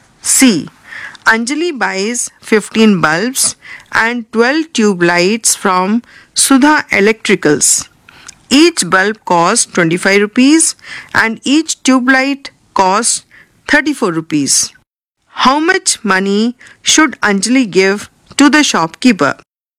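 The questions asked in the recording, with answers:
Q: How much money should Anjali give to the shopkeeper?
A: 783 rupees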